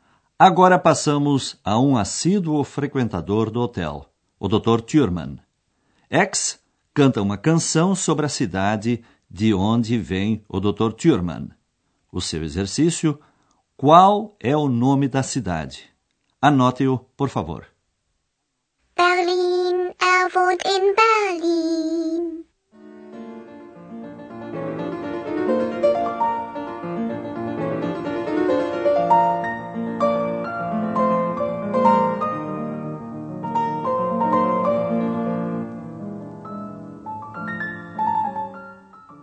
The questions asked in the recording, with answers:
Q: qual é o nome da cidade?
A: A quinta palavra procurada é Berlin.